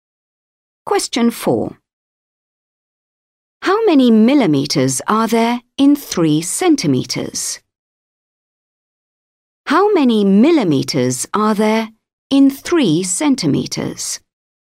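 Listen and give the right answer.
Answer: 30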